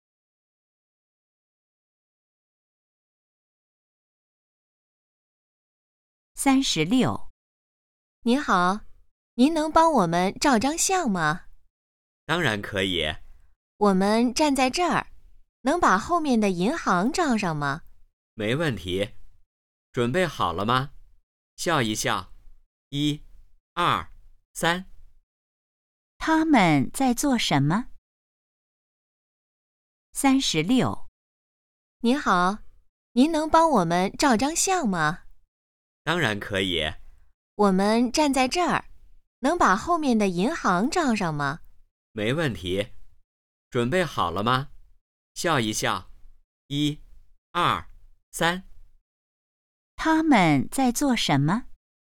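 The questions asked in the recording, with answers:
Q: 他们在做什么?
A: 照相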